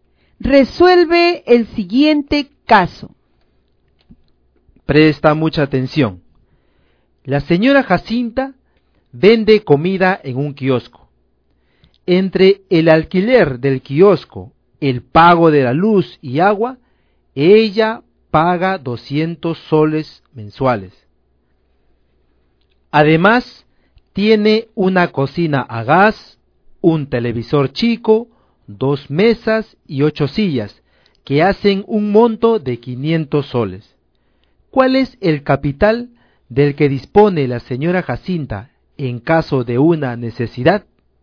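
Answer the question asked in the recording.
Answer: 300 soles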